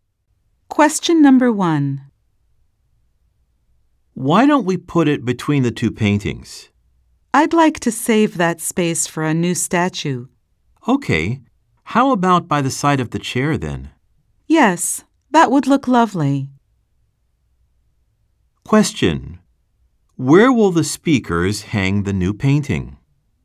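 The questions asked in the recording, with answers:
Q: Where will the speakers hang the new painting?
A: By the side of the chair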